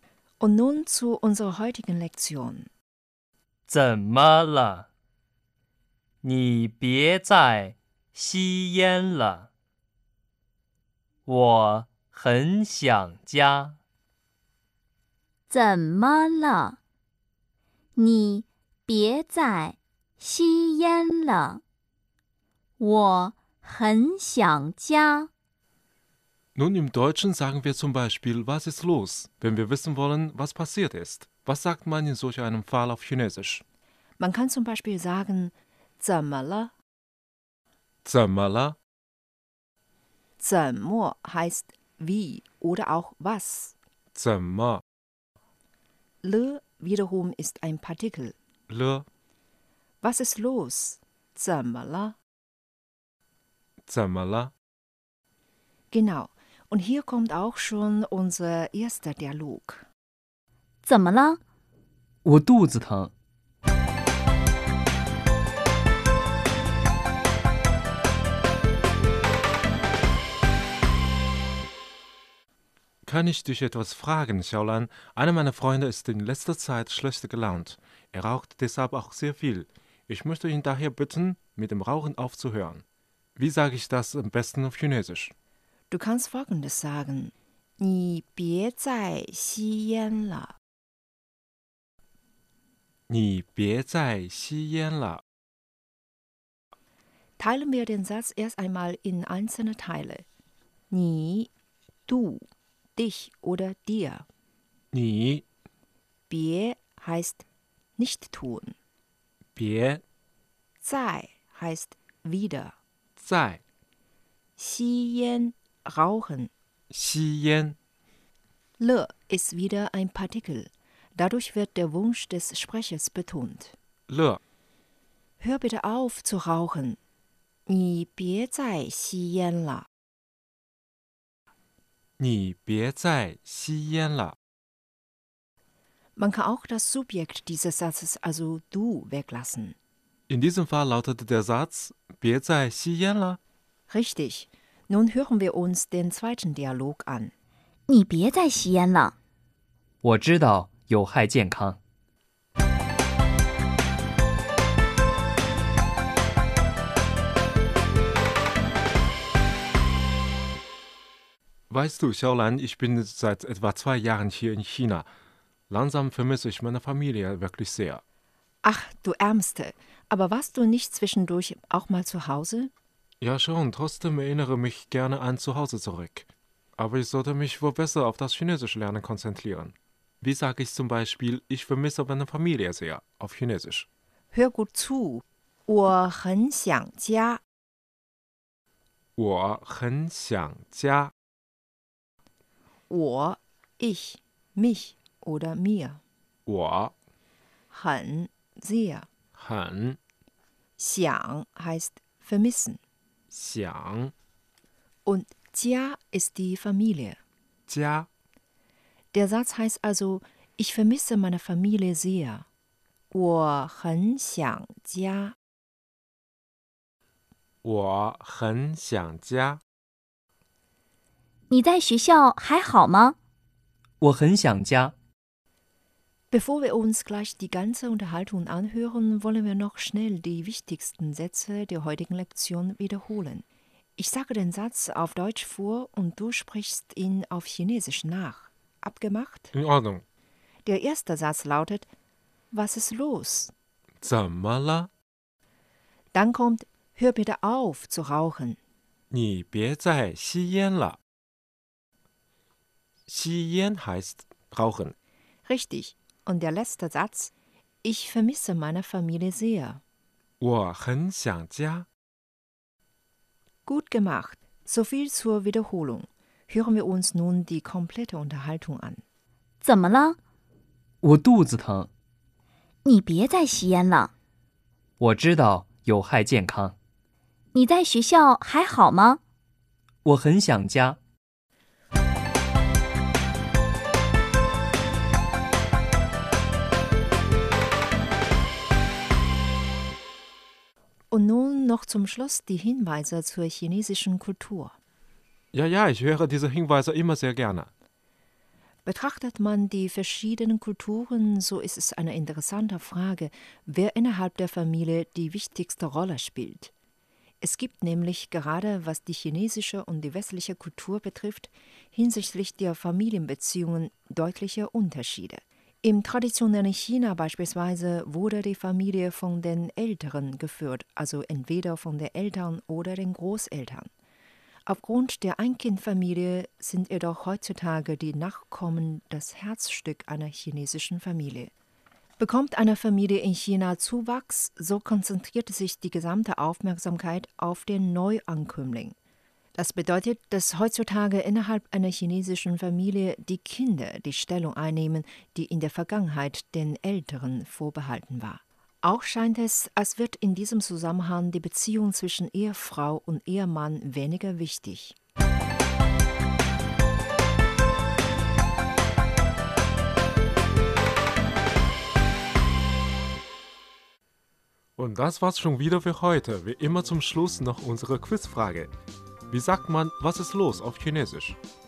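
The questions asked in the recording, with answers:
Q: Wie sagt man, was ist los auf Chinesisch?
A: 怎么了?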